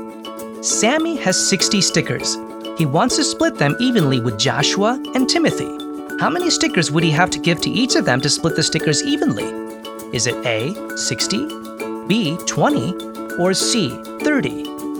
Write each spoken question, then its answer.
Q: How many stickers would he have to give to each of them to split the stickers evenly?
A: That's right, there are three boys, so each would need 20 stickers to divide them evenly.